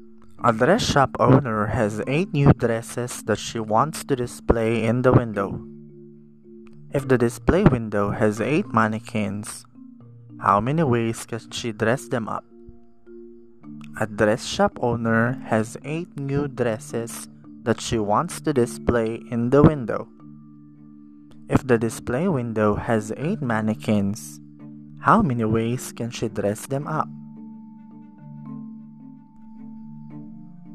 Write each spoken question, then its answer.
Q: If the display window has 8 mannequins, how many ways can she dress them up?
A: If your answer is 40,320, you are correct.